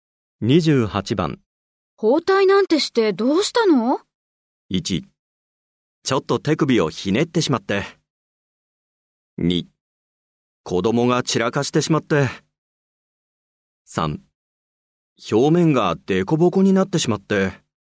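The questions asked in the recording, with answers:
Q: 包帯なんてしてどうしたの?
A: 1: ちょっと手首をひねってしまって。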